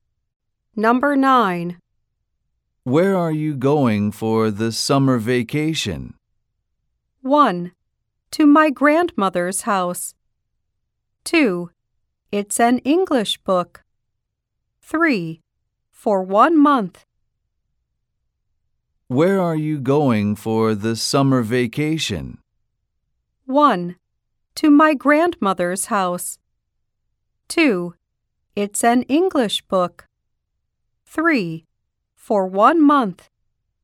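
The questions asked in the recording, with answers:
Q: Where are you going for the summer vacation?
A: 1: To my grandmother's house.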